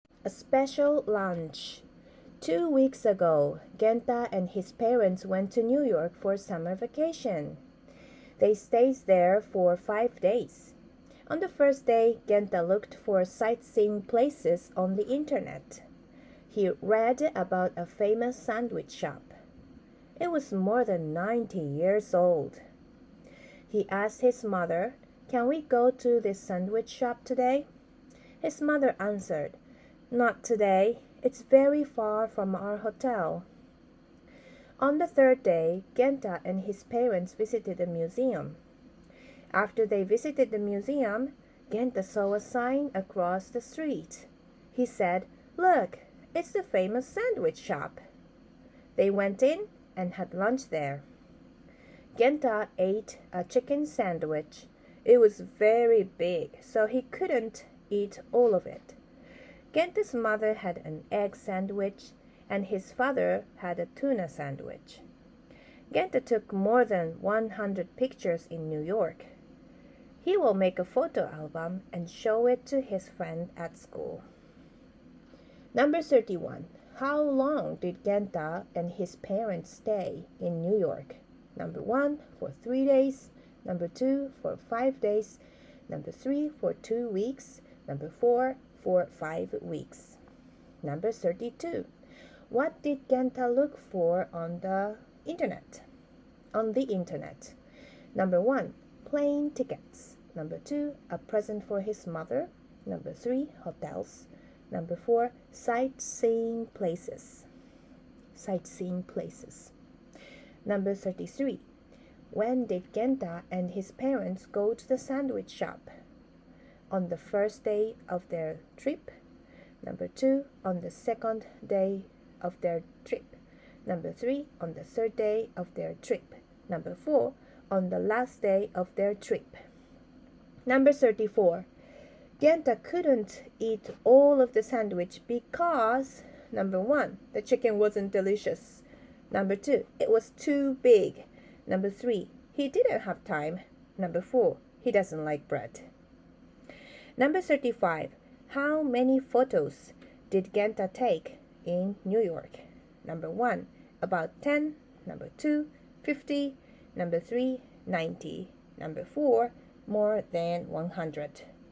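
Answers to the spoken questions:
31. 2: for 5 days
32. 4: sightseeing places
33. 3: on the third day of their trip
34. 2: it was too big
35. 4: more than 100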